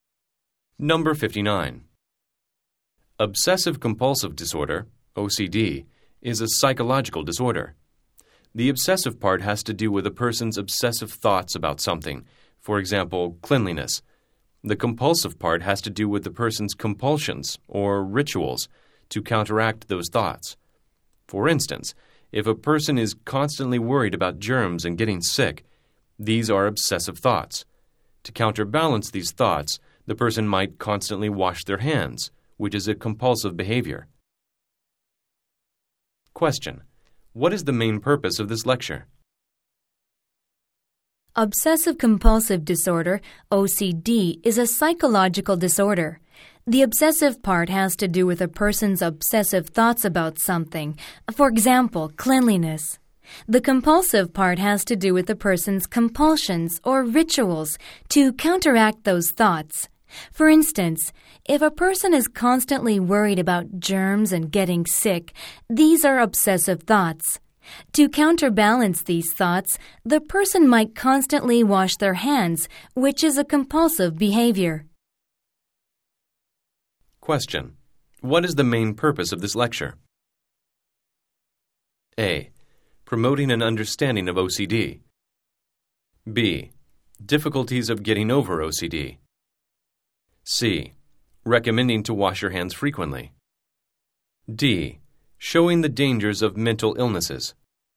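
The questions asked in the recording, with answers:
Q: What is the main purpose of this lecture?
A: A: Promoting an understanding of OCD.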